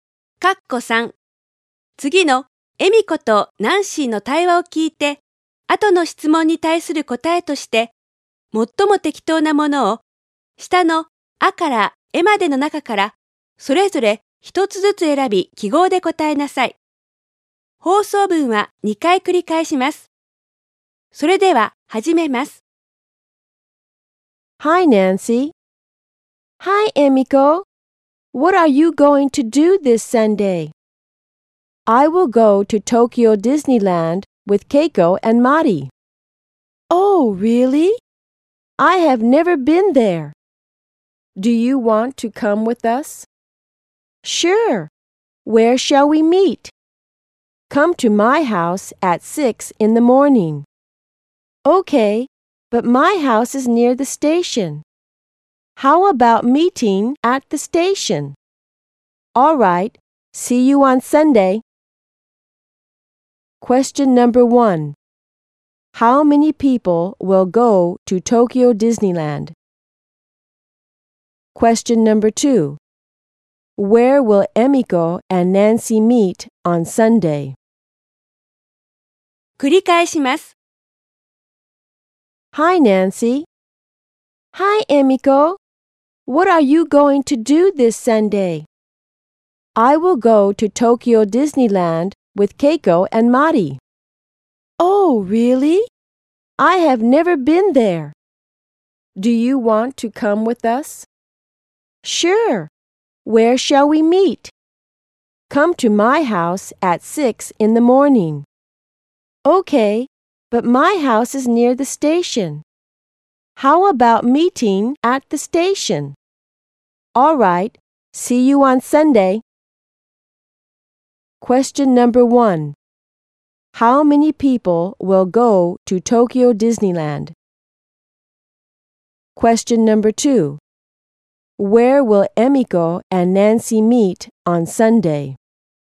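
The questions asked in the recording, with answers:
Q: How many people will go to Tokyo Disneyland?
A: Four

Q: Where will Emiko and Nancy meet on Sunday?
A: At the station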